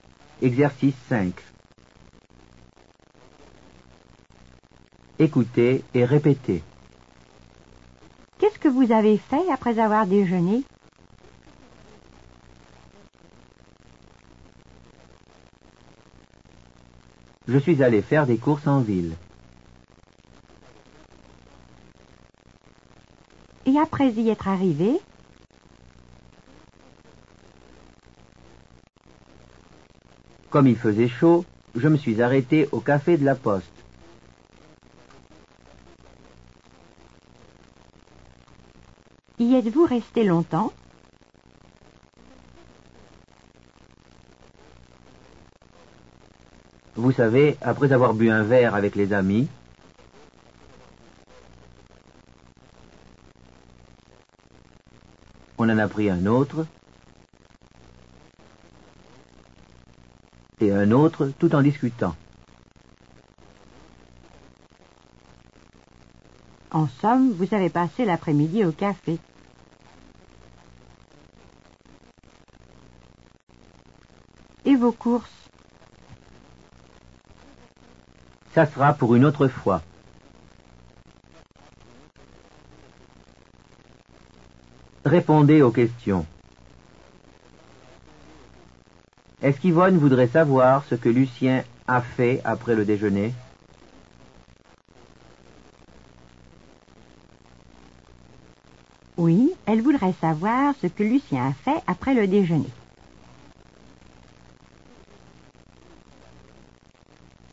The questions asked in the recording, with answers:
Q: Où est-il allé?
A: Il est allé faire des courses en ville.